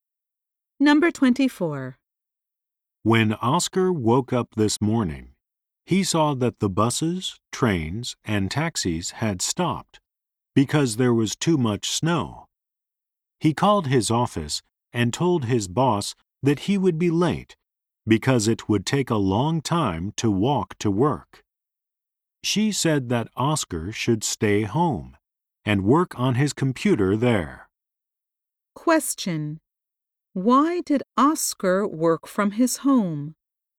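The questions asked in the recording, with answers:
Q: Why did Oscar work from his home?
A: There was too much snow, so the buses, trains and taxis stopped, and his boss told him to work at home.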